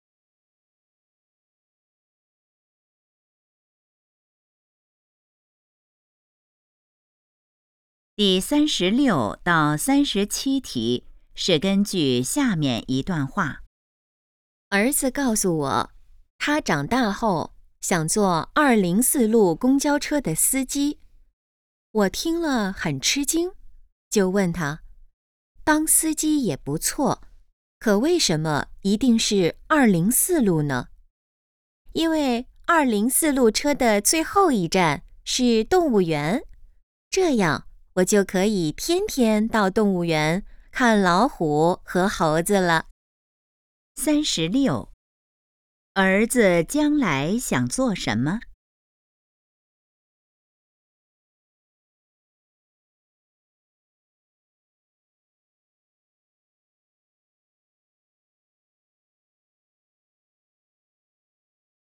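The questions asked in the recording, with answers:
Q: 儿子将来想做什么?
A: 204路公交车司机

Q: 关于204路公交车,可以知道什么?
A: 最后一站是动物园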